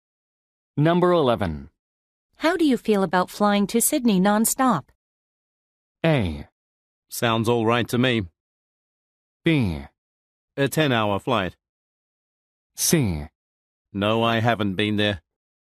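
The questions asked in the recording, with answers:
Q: How do you feel about flying to Sydney non-stop?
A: A: Sounds all right to me.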